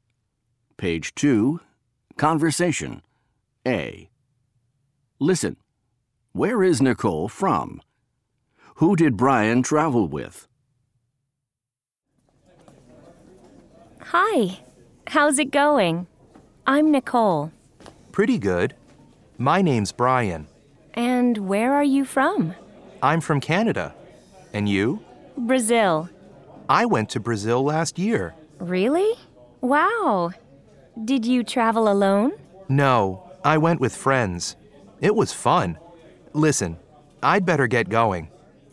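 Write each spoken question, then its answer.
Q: Where is Nicole from?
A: Brazil

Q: Who did Brian travel with?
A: With friends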